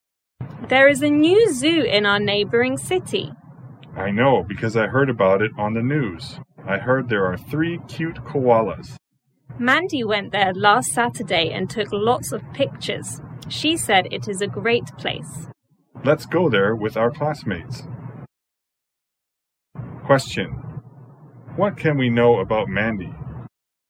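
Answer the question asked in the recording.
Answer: She went to the new zoo last Saturday and took lots of pictures.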